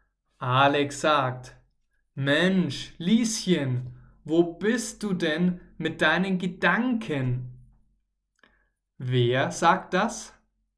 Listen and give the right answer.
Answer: Alex. Alex sagt das.